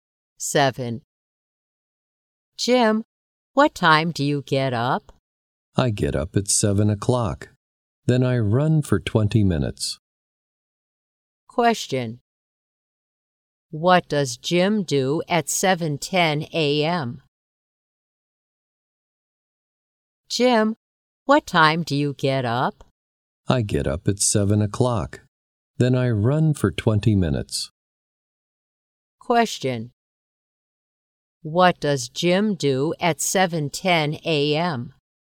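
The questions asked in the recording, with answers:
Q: What does Jim do at 7:10 a.m.?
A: He runs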